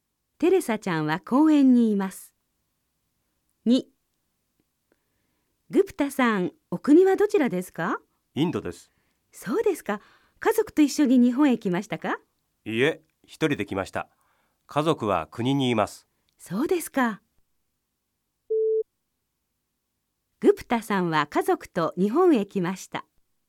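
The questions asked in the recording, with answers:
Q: そうですか。グプタさんは家族と日本へ来ました。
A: ×(正しくない)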